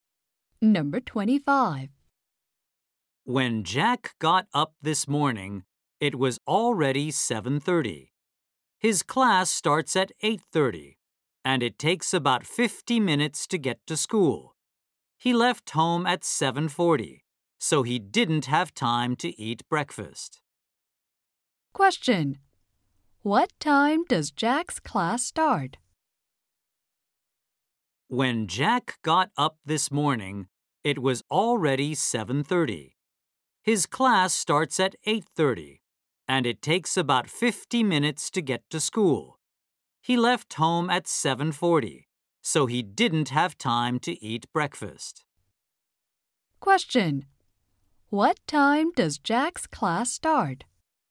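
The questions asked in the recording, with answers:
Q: What time does Jack's class start?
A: 8:30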